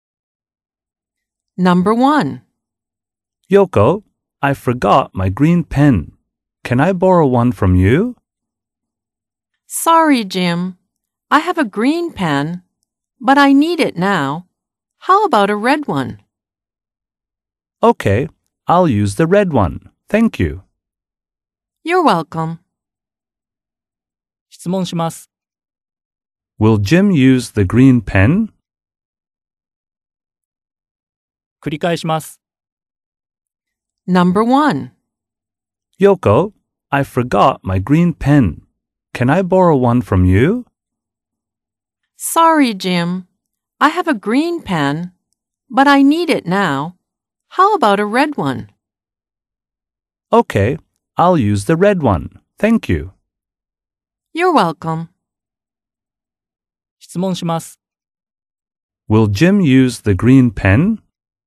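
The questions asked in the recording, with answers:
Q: Will Jim use the green pen?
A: No, he won't. He will use the red one.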